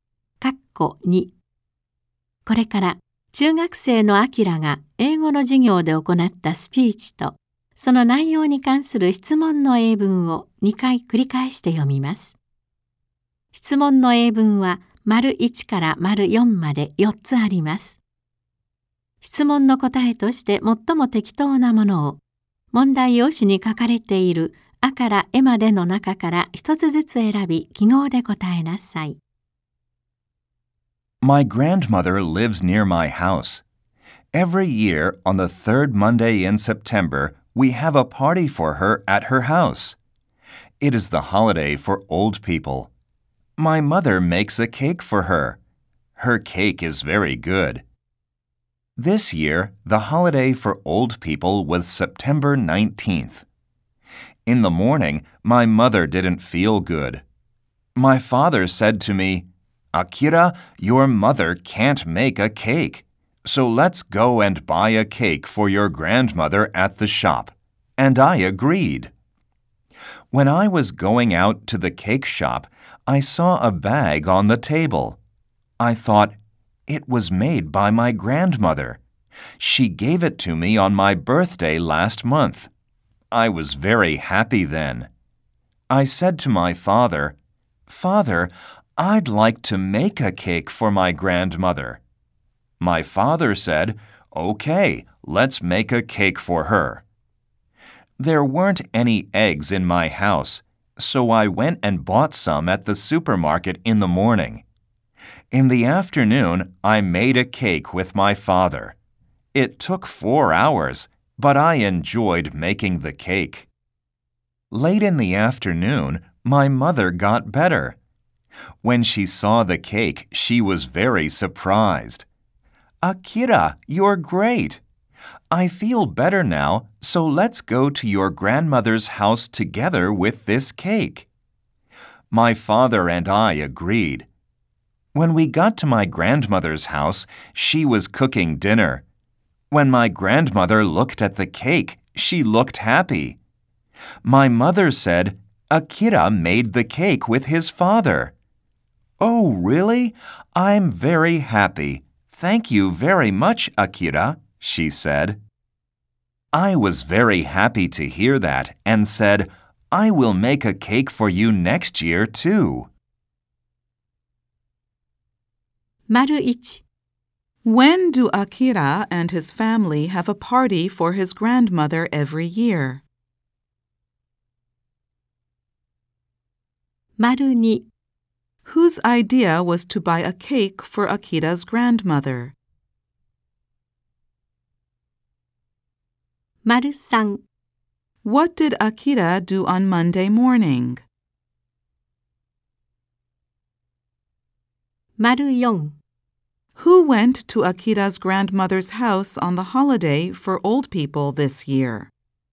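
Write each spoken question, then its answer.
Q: When do Akira and his family have a party for his grandmother every year?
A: On the third Monday in September

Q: Whose idea was to buy a cake for Akira's grandmother?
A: Akira's father's

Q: What did Akira do on Monday morning?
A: He bought eggs at the supermarket

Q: Who went to Akira's grandmother's house on the holiday for old people this year?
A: Akira, his father and his mother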